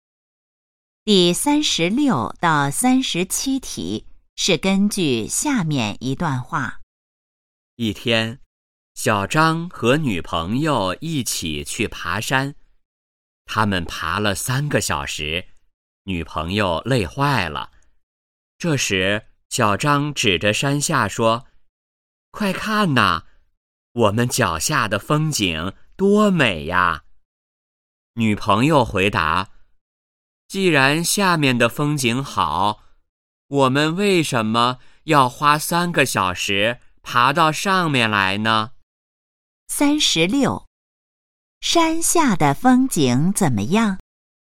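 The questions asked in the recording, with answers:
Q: 山下的风景怎么样?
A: 很美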